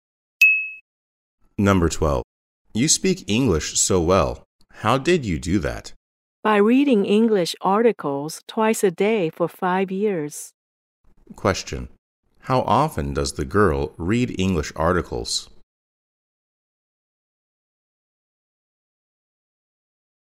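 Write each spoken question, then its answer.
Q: How often does the girl read English articles?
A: Twice a day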